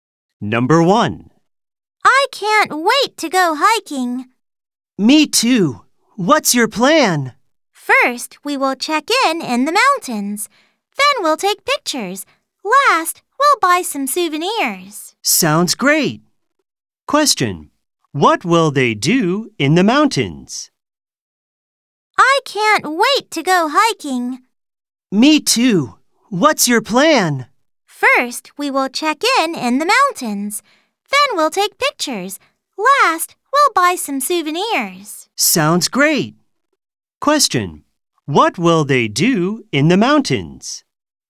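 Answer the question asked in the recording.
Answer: Check in, take pictures, and buy some souvenirs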